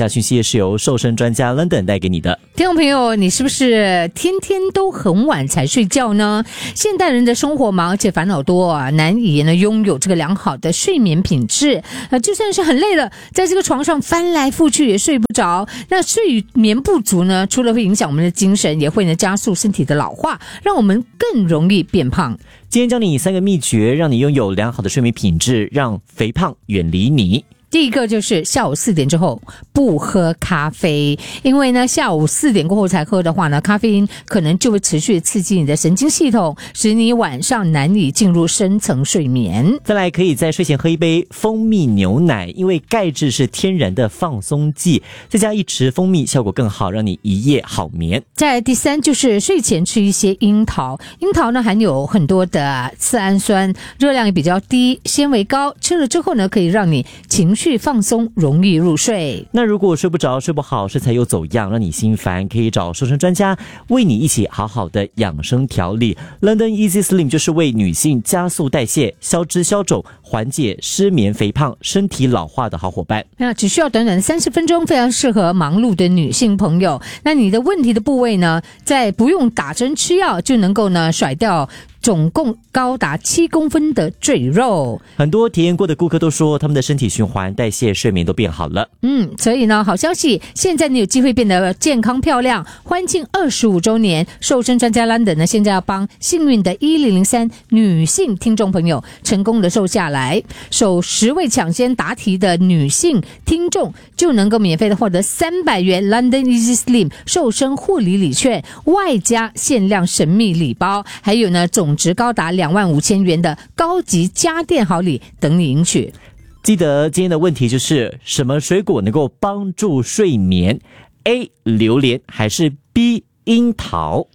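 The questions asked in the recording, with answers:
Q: 什么水果能够帮助睡眠? A 榴莲还是 B 樱桃?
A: B: 樱桃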